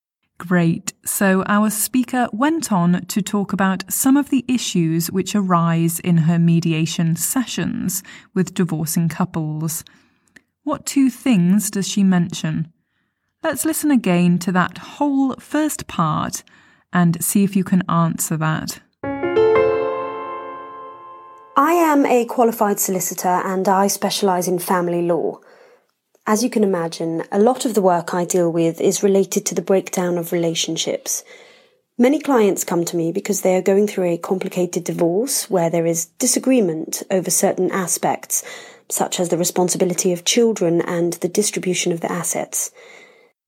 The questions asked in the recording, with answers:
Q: What two things does she mention?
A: So she talked about the responsibility of children and the distribution of assets.